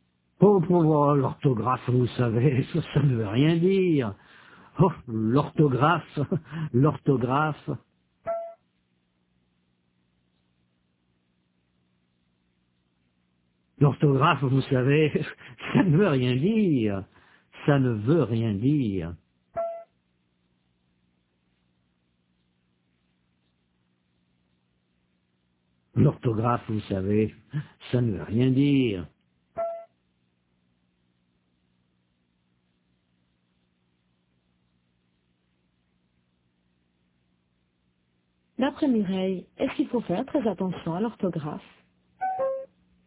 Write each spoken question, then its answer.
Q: D'après Mireille, est-ce qu'il faut faire très attention à l'orthographe?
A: Non, l'orthographe, ça ne veut rien dire.